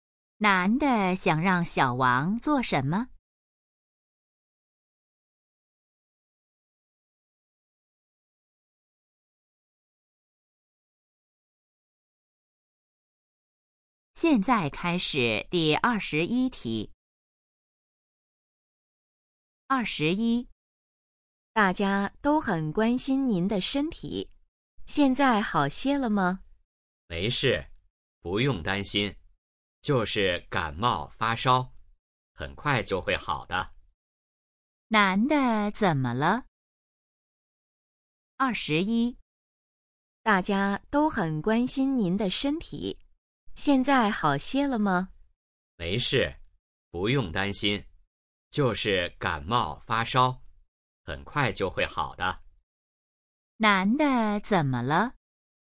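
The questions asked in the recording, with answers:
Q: 男的怎么了?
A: 感冒发烧了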